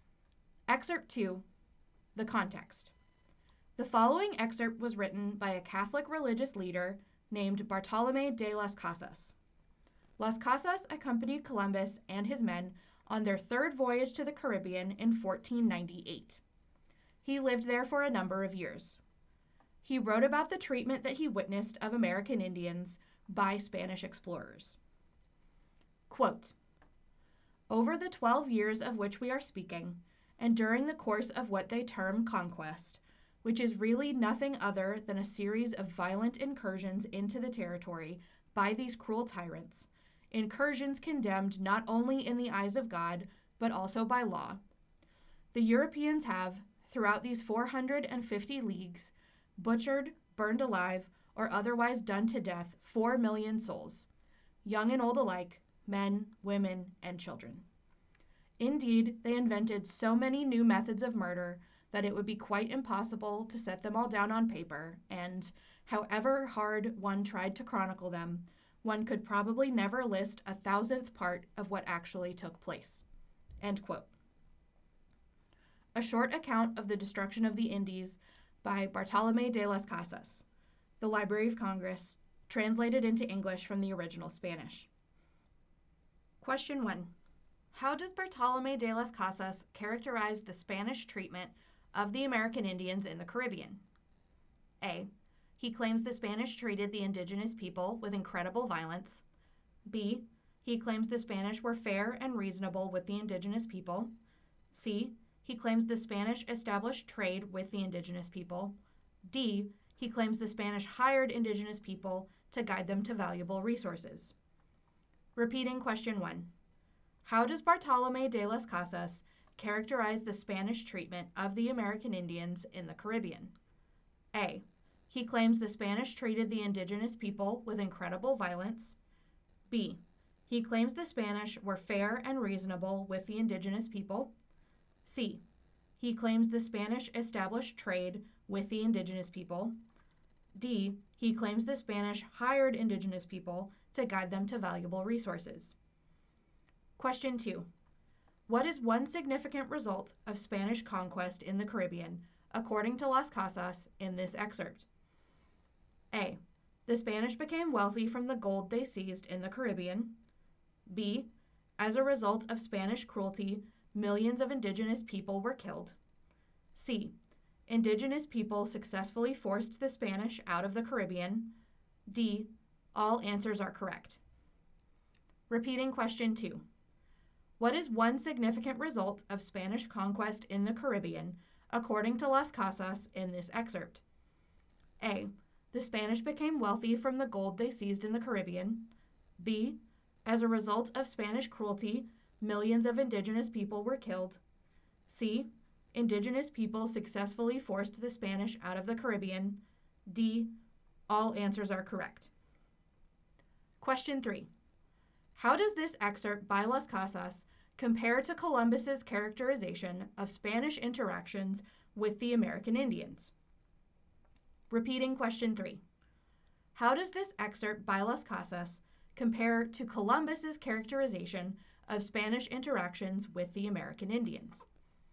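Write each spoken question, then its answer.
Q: How does Bartolomé de las Casas characterize the Spanish treatment of the American Indians in the Caribbean?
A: A: He claims the Spanish treated the indigenous people with incredible violence.

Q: What is one significant result of Spanish conquest in the Caribbean, according to Las Casas, in this excerpt?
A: B: As a result of Spanish cruelty, millions of indigenous people were killed.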